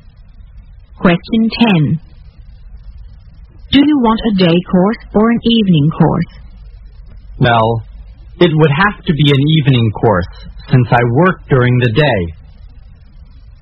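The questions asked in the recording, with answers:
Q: What are they talking about?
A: Choosing a day or evening course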